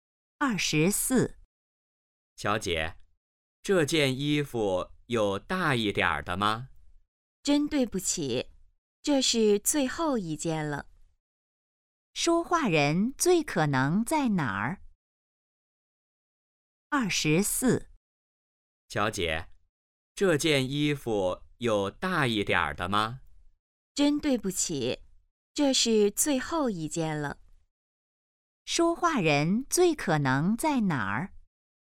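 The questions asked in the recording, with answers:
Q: 说话人最可能在哪儿?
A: 商店(买衣服)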